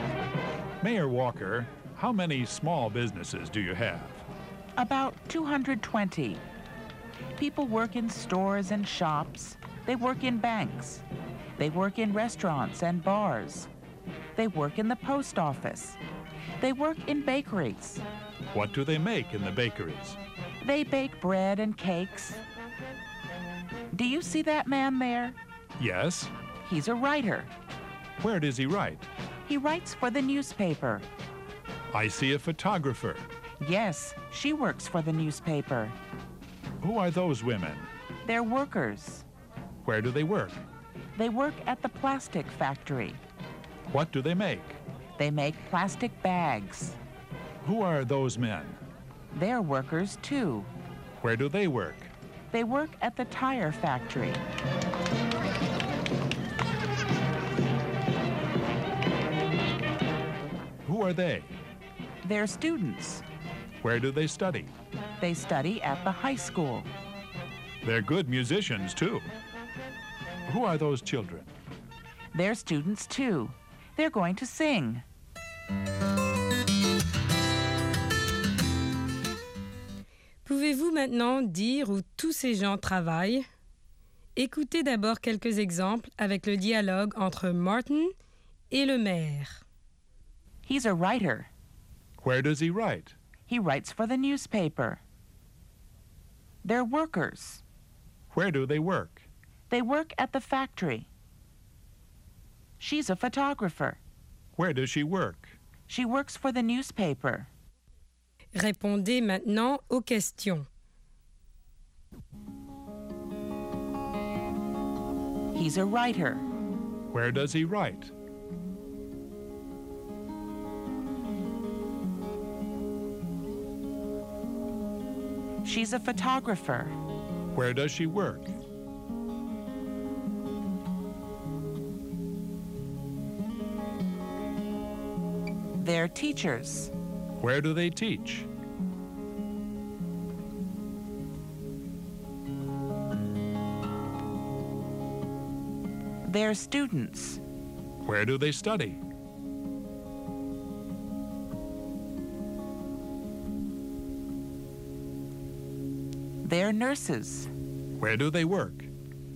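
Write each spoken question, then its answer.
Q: Where does he write?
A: He writes for the newspaper.

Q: Where does she work?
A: She works for the newspaper.

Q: Where do they study?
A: They study at the high school.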